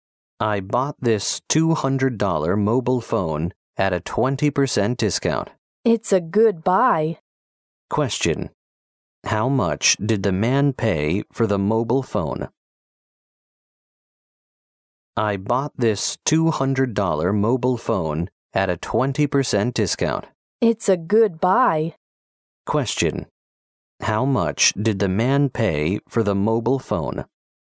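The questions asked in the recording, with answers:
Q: How much did the man pay for the mobile phone?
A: $160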